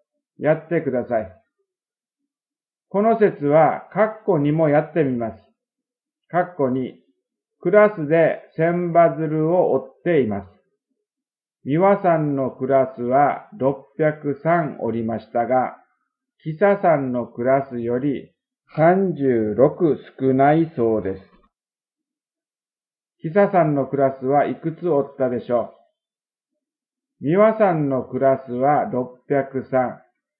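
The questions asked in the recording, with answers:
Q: キサさんのクラスはいくつ折ったでしょう?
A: 639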